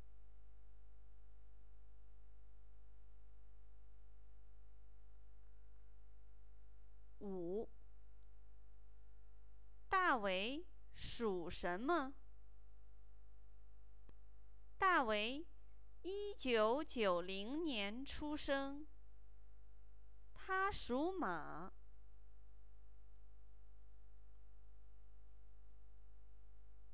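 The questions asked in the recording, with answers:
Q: 大伟属什么?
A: 属马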